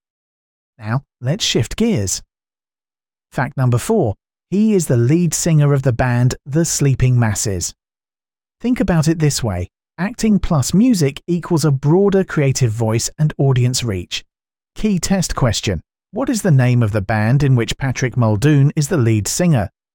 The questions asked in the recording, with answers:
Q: What is the name of the band in which Patrick Muldoon is the lead singer?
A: Correct answer. The Sleeping Masses.